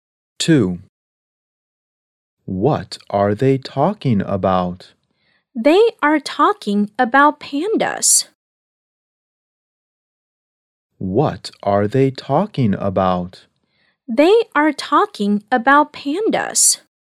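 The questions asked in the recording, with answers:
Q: What are they talking about?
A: Pandas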